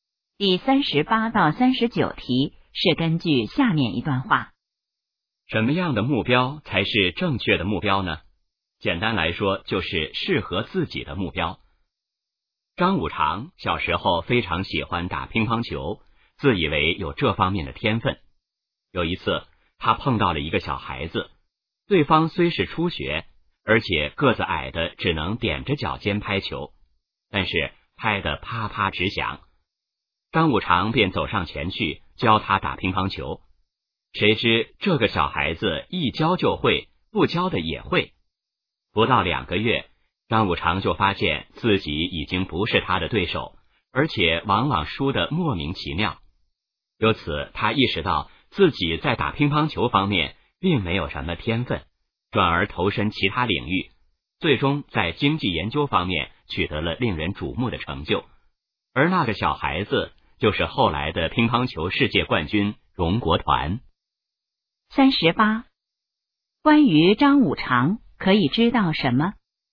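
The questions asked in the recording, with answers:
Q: 这段话主要想说明什么?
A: 要选择适合自己的目标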